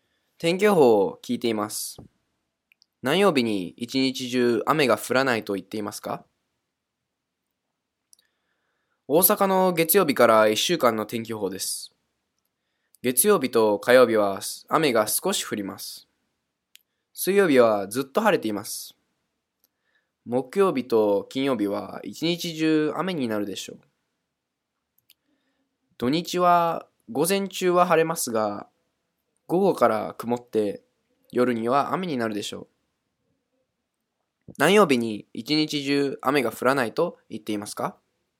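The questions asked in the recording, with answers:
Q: 何曜日に一日中雨が降らないと言っていますか?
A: 水曜日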